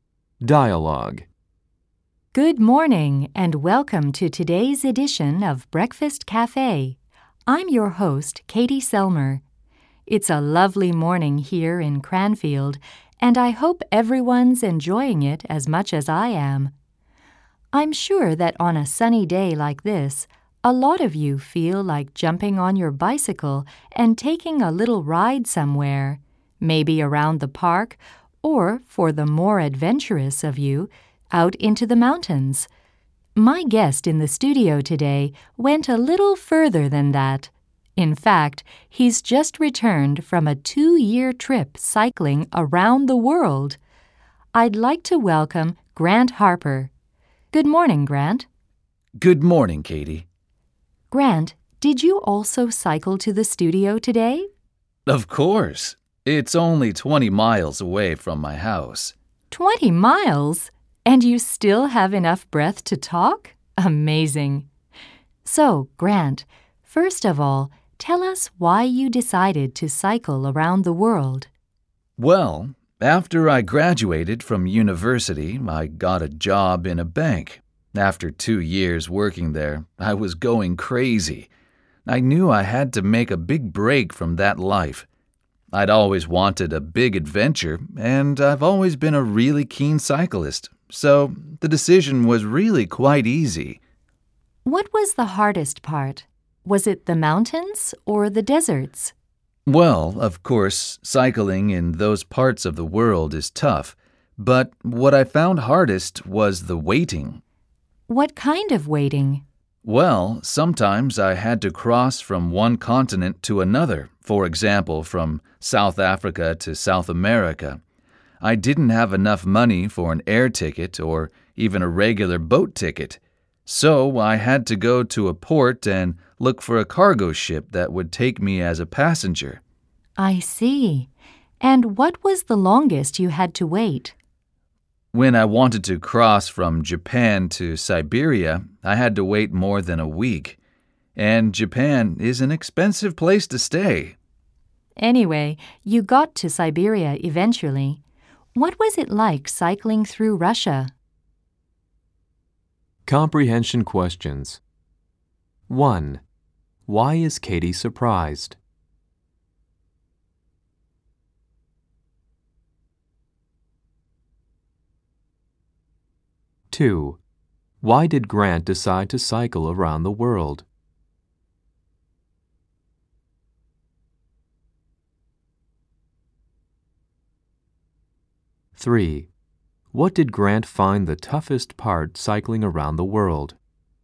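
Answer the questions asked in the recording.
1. Grant cycled 20 miles to the studio and still has enough breath to talk
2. He was going crazy working in a bank and wanted a big adventure
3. The waiting for cargo ships to cross between continents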